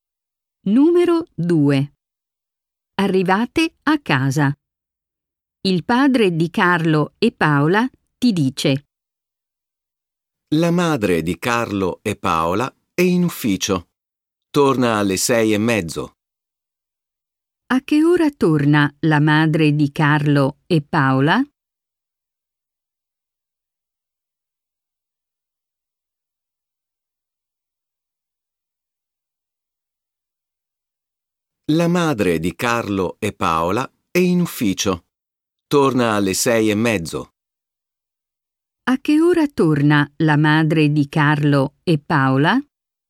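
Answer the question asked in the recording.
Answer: Alle 6:30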